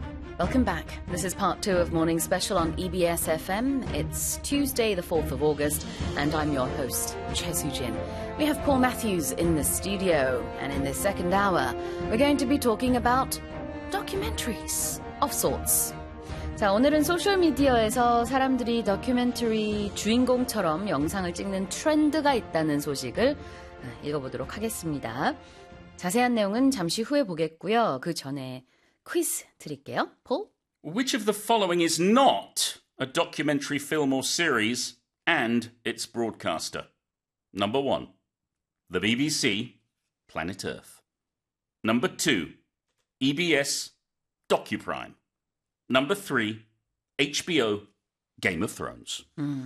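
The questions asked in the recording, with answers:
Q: Which of the following is not a documentary film or series and its broadcaster?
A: Number three: HBO, Game of Thrones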